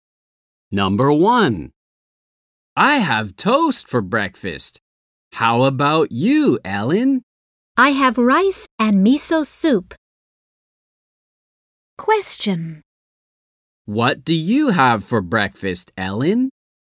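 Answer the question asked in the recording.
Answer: I have rice and miso soup.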